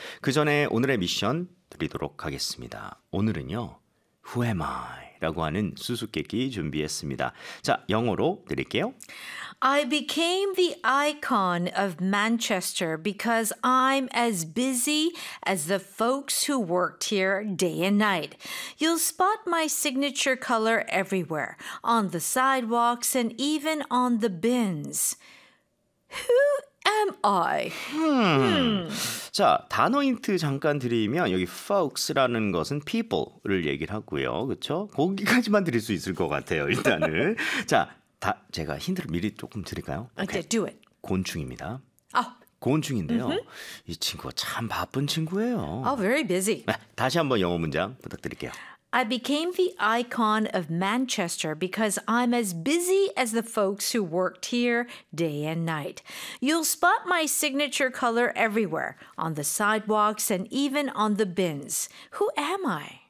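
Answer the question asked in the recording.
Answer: A bee (the worker bee)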